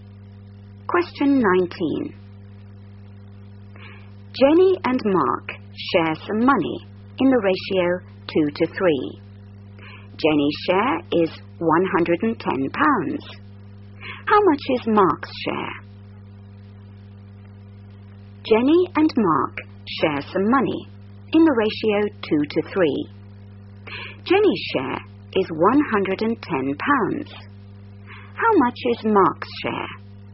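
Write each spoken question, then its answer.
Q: Jenny's share is £110. How much is Mark's share?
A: £165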